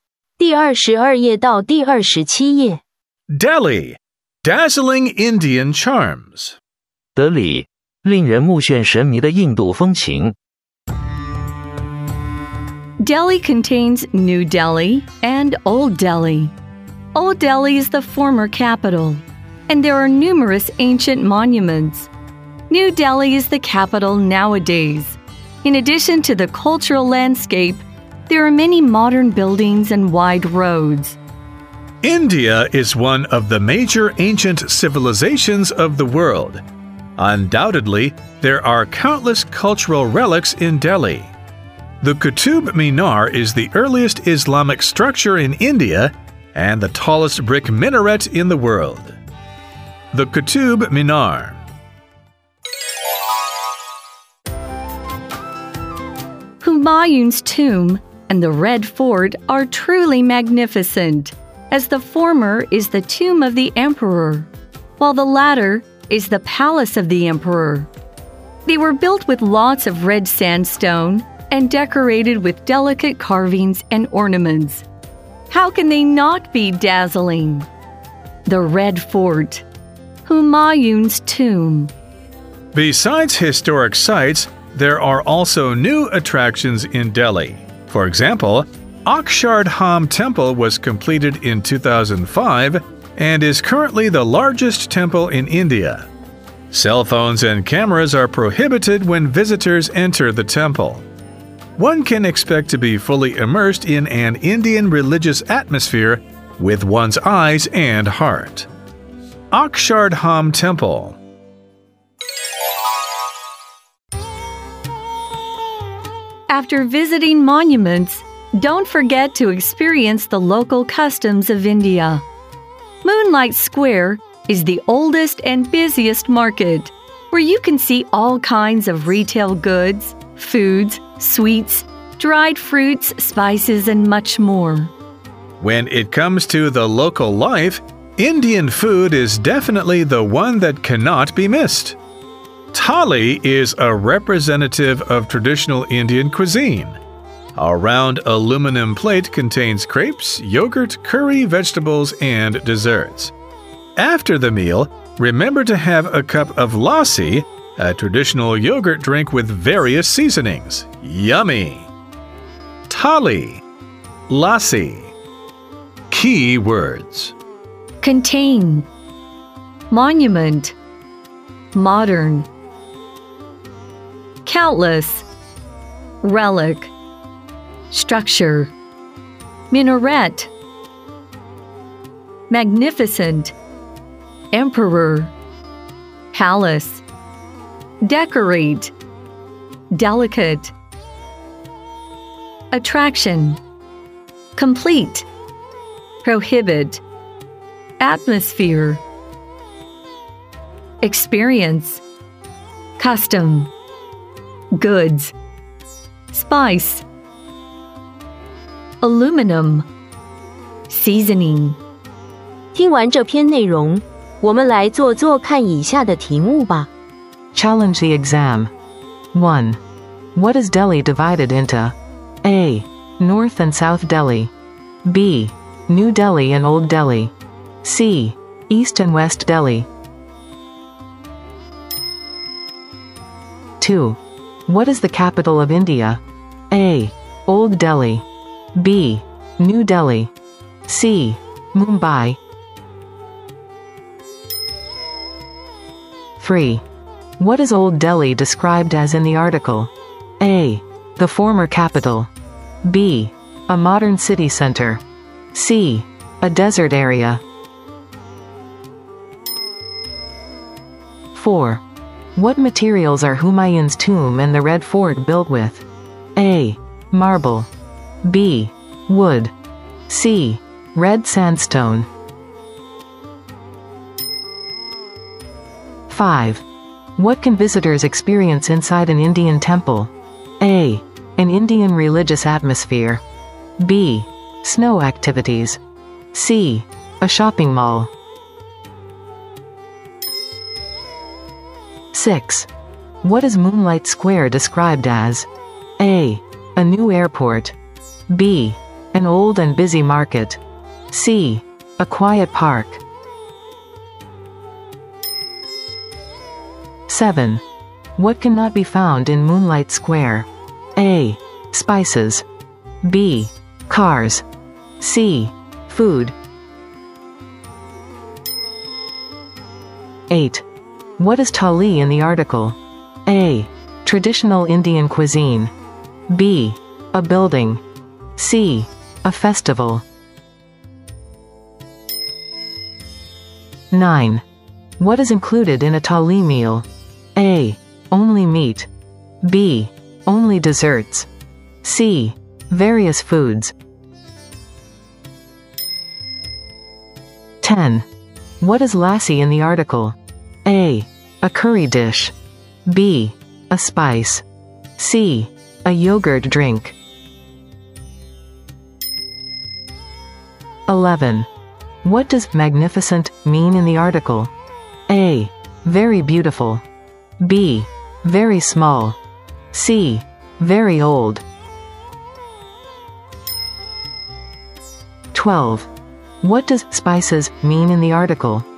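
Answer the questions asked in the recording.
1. B: New Delhi and Old Delhi
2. B: New Delhi
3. A: The former capital
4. C: Red sandstone
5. A: An Indian religious atmosphere
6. B: An old and busy market
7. B: Cars
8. A: Traditional Indian cuisine
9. C: Various foods
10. C: A yogurt drink
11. A: Very beautiful
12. C: Seasonings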